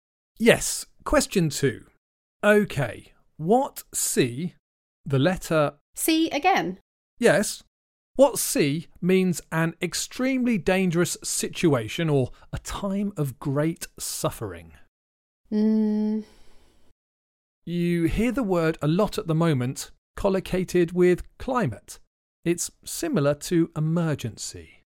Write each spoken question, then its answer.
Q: What sea means an extremely dangerous situation or a time of great suffering?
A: Climate crisis. The answer is crisis.